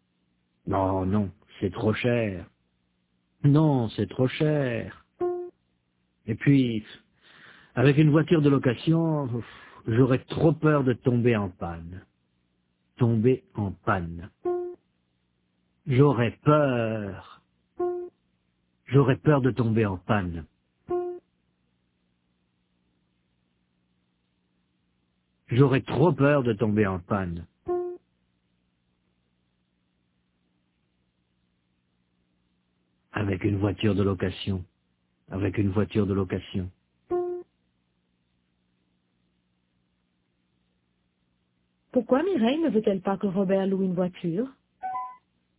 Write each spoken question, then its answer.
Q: Pourquoi Mireille ne veut-elle pas que Robert loue une voiture?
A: Parce que c'est trop cher et puis qu'elle aurait trop peur de tomber en panne.